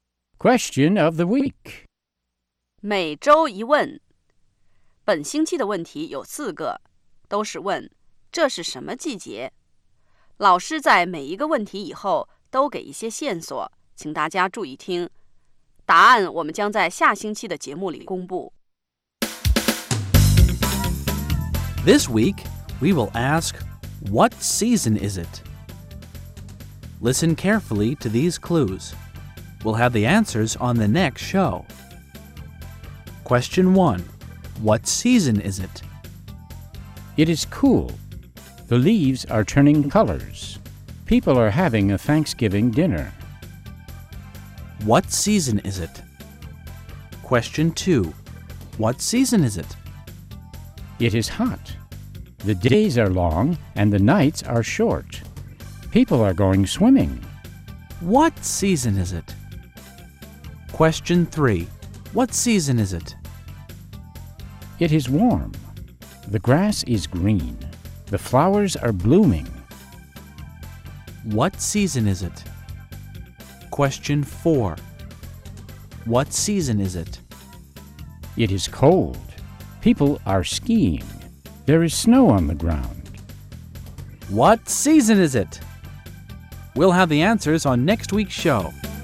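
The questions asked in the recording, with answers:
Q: What season is it?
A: Autumn (fall)

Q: What season is it?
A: Summer

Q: What season is it?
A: Spring

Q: What season is it?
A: Winter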